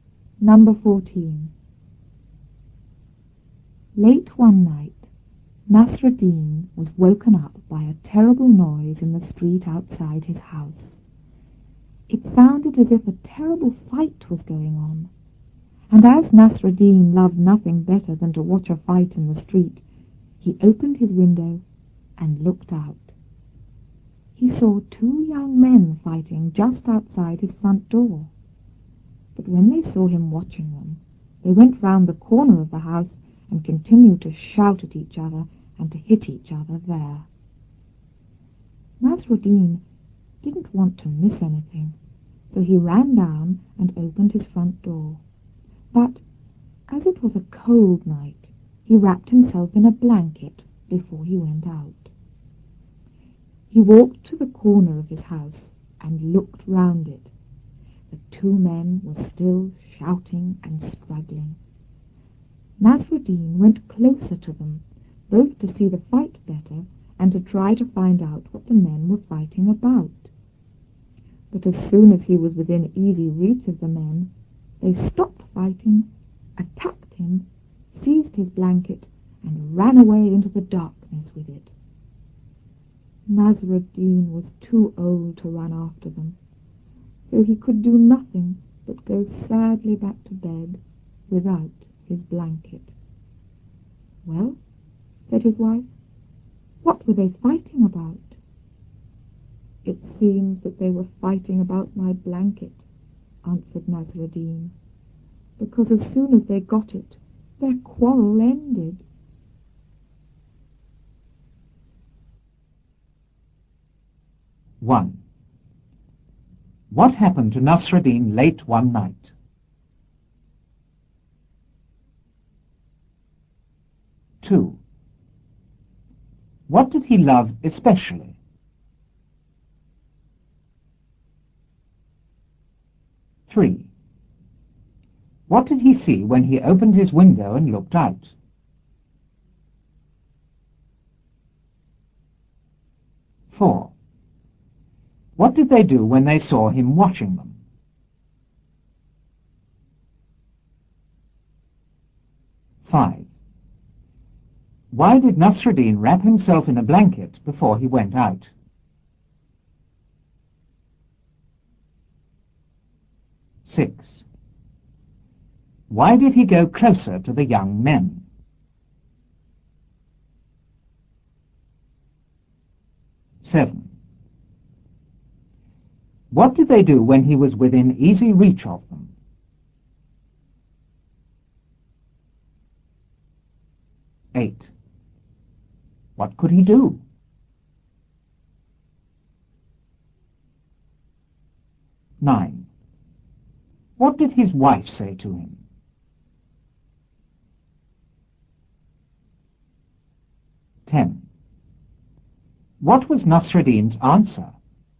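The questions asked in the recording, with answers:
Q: What happened to Nasruddin late one night?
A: He was woken up by a terrible noise in the street outside his house.

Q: What did he love especially?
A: Watching a fight in the street.

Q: What did he see when he opened his window and looked out?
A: Two young men fighting just outside his front door.

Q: What did they do when they saw him watching them?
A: They went round the corner of the house and kept shouting at and hitting each other.

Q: Why did Nasruddin wrap himself in a blanket before he went out?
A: Because it was a cold night.

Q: Why did he go closer to the young men?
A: To see the fight better and find out what they were fighting about.

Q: What did they do when he was within easy reach of them?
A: They stopped fighting, attacked him, took his blanket and ran away.

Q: What could he do?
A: Nothing but go sadly back to bed without his blanket.

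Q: What did his wife say to him?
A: "Well, what were they fighting about?"

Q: What was Nasruddin's answer?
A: They were fighting about his blanket, because their quarrel ended as soon as they got it.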